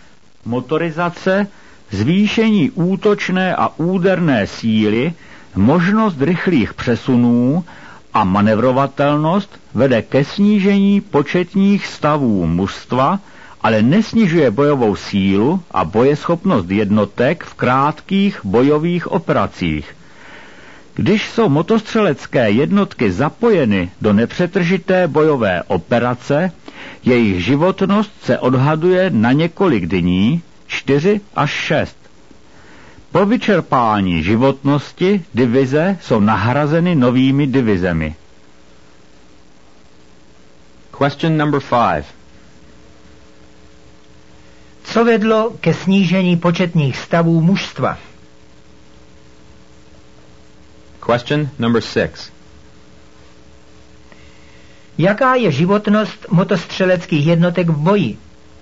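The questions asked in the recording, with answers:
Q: Co vedlo ke snížení početních stavů mužstva?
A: Motorizace, zvýšení útočné a úderné síly, možnost rychlých přesunů a manévrovatelnost

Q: Jaká je životnost motostřeleckých jednotek v boji?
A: Několik dní, 4 až 6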